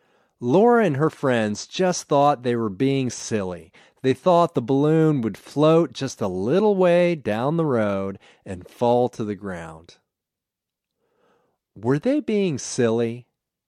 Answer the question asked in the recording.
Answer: Yes, they were being silly.